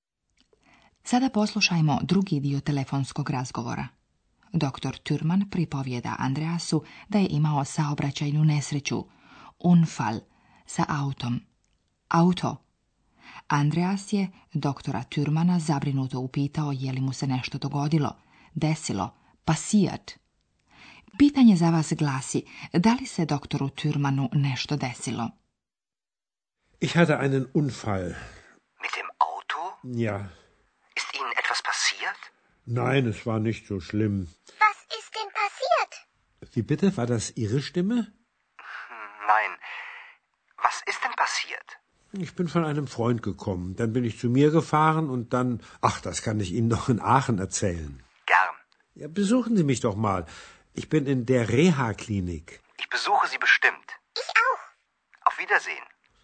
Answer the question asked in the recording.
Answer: Doktoru Türmanu se u najmanju ruku nije ništa strašno desilo.